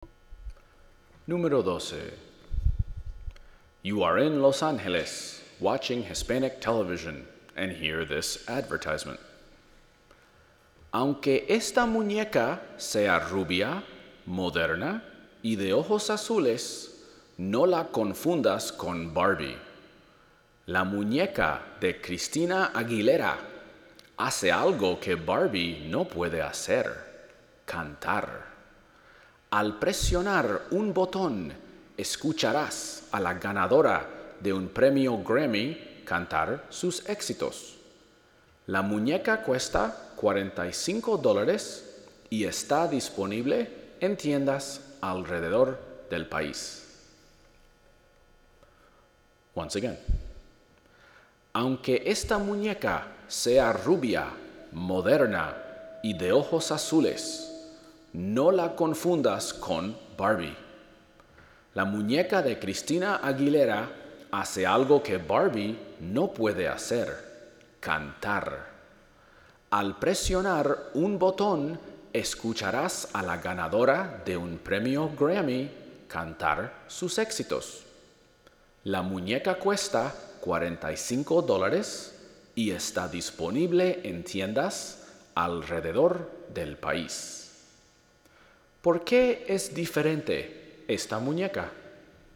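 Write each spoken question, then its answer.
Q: ¿Por qué es diferente esta muñeca?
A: Puede cantar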